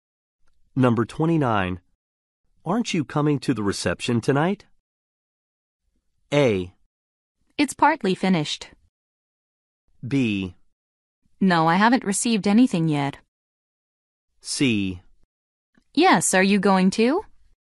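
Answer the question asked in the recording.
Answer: C: Yes, are you going to?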